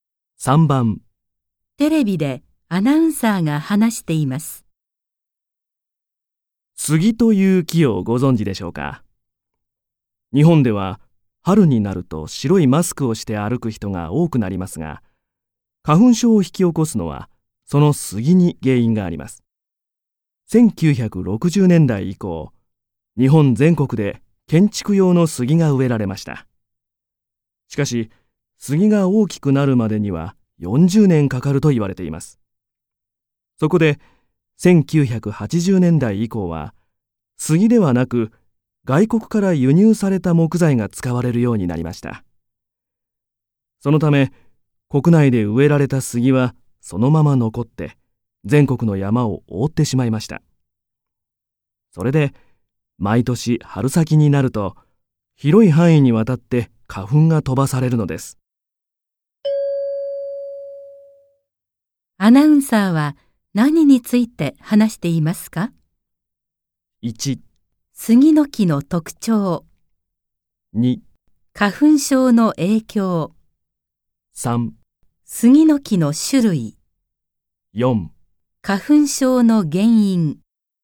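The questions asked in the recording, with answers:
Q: アナウンサーは何について話していますか ?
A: 4: 花粉症の原因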